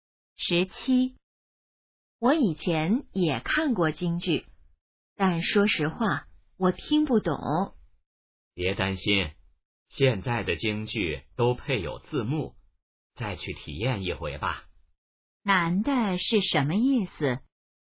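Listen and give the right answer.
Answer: 再去看一次京剧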